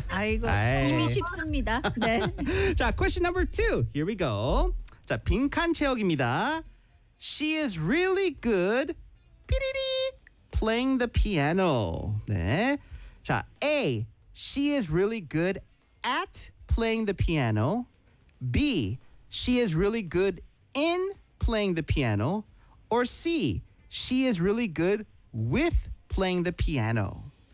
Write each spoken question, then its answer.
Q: She is really good playing the piano.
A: 정답은 A at.